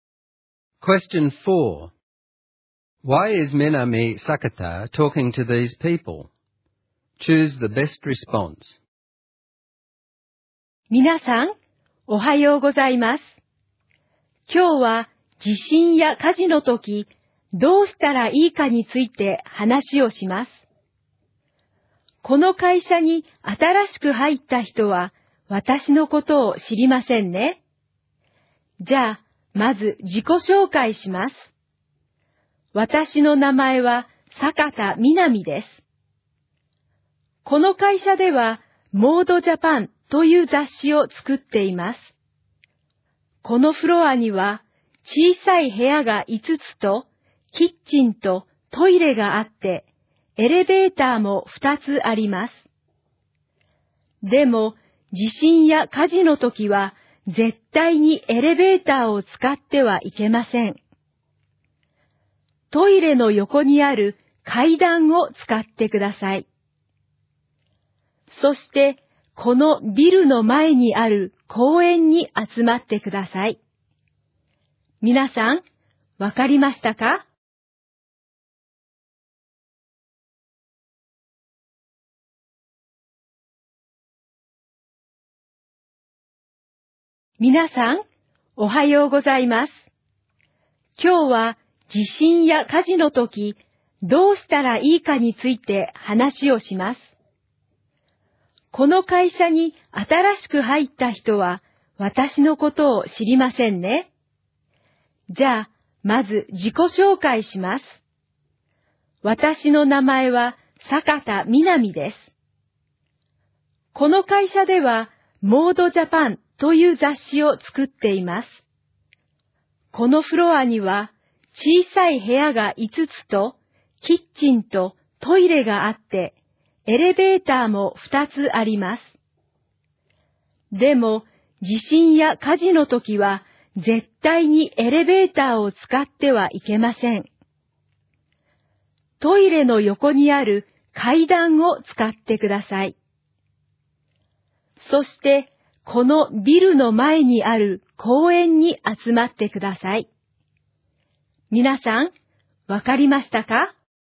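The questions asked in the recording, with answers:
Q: Why is Minami Sakata talking to these people?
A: To explain to employees (including new staff) what to do in an earthquake or fire: don't use the elevators, use the stairs next to the toilets, and gather in the park in front of the building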